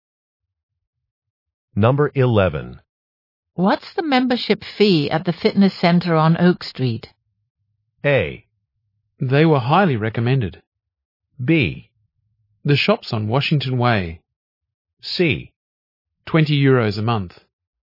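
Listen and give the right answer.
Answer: C: 20 euros a month.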